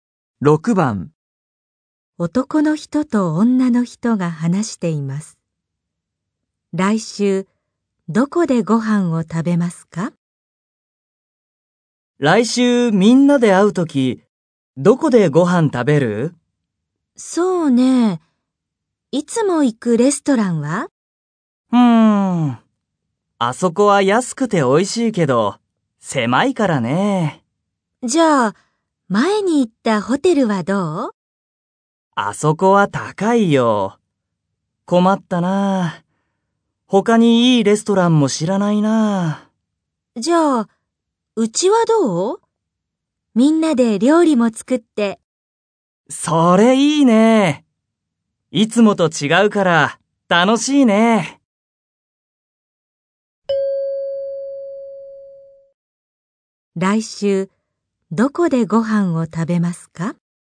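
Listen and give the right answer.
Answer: 女の人のうち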